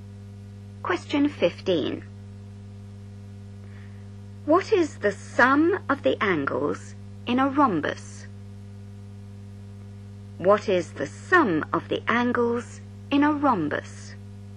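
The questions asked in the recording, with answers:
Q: What is the sum of the angles in a rhombus?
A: 360 degrees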